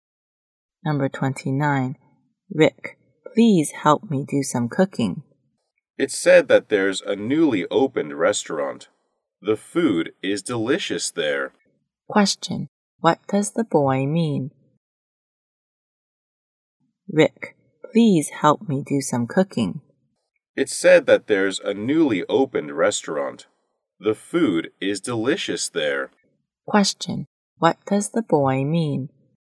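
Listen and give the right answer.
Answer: He wants to eat at the new restaurant instead of cooking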